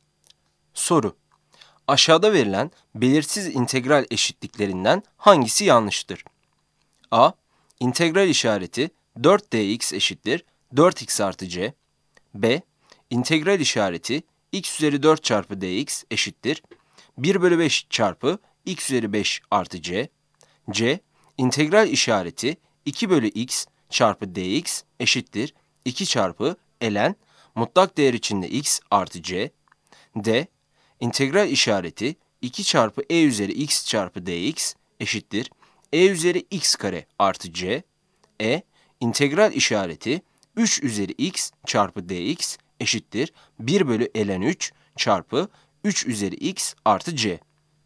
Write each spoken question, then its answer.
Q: Aşağıda verilen belirsiz integral eşitliklerinden hangisi yanlıştır?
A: Yanıt d'dir.